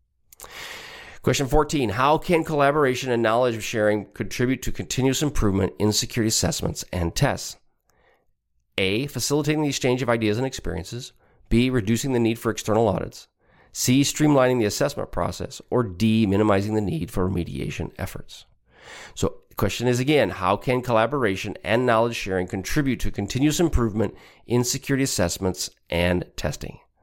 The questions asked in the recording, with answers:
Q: How can collaboration and knowledge sharing contribute to continuous improvement in security assessments and tests?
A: Answer is A, facilitating the exchange of ideas and experiences.